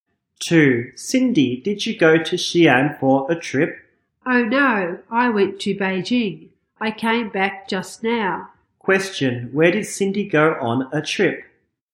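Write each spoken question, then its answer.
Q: Where did Cindy go on a trip?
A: Beijing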